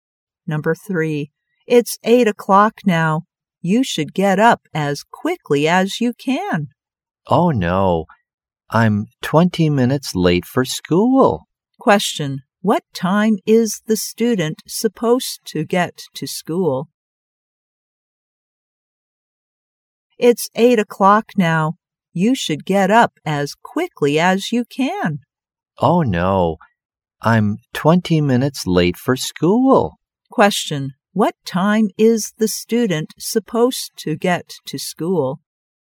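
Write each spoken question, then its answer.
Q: What time is the student supposed to get to school?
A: 7:40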